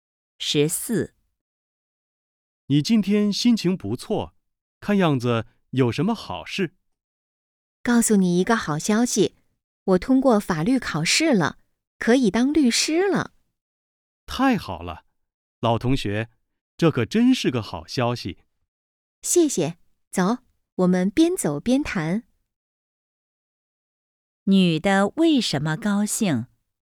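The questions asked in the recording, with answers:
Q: 女的为什么高兴?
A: 通过法律考试了,可以当律师了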